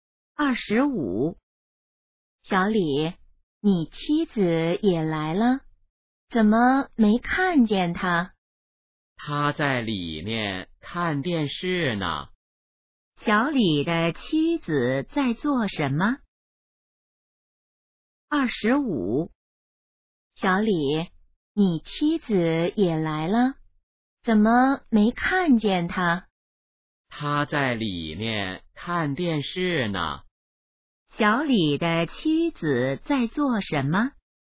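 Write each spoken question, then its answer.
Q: 小李的妻子在做什么?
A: 看电视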